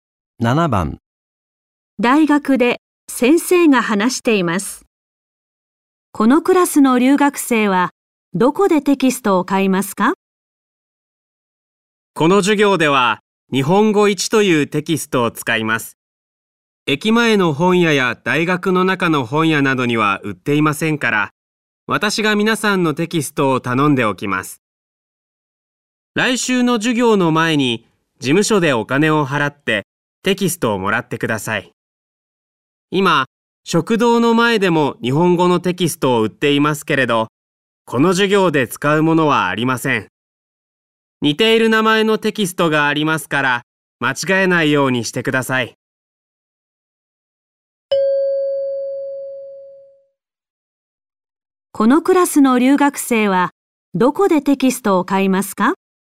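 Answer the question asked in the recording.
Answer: 事務所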